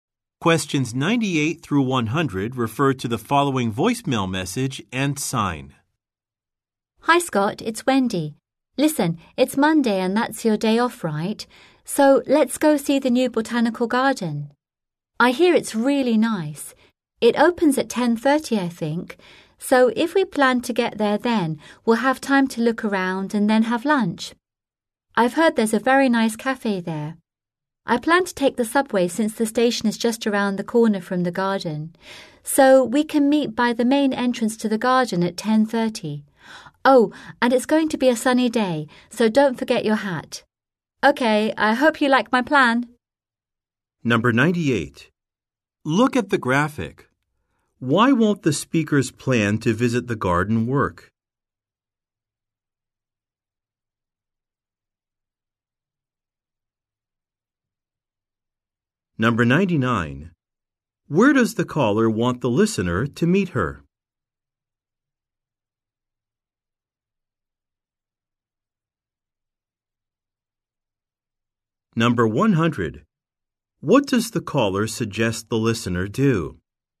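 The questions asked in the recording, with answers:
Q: Where does the caller want the listener to meet her?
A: By the main entrance to the garden

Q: What does the caller suggest the listener do?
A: Bring a hat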